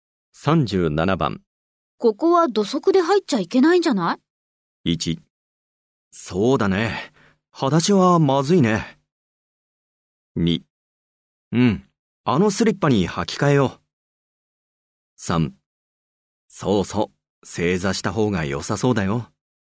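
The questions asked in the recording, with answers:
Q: ここは土足で入っちゃいけないんじゃない?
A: 2: うん。あのスリッパに履き替えよう。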